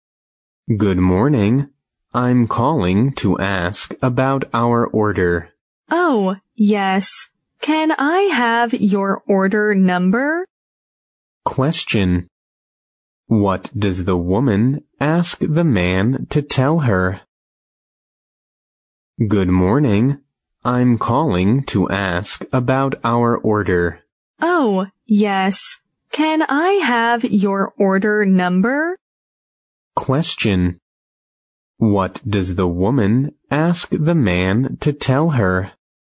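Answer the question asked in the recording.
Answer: The order number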